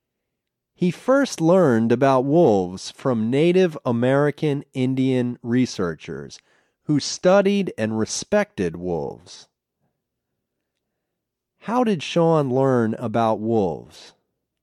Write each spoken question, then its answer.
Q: How did Sean learn about wolves?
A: He learned about wolves from Native American Indian researchers.